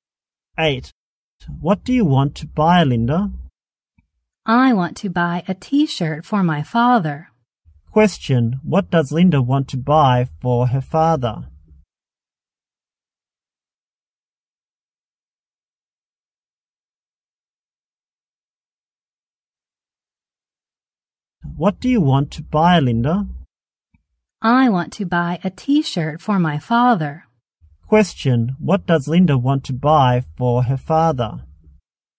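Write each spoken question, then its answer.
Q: Question, what does Linda want to buy for her father?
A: A T-shirt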